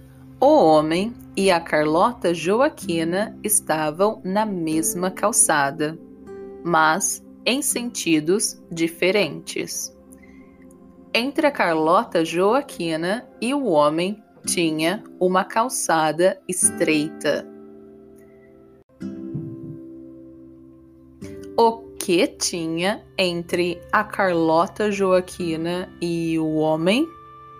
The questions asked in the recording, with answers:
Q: O que tinha entre a Carlota Joaquina e o homem?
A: Uma calçada estreita.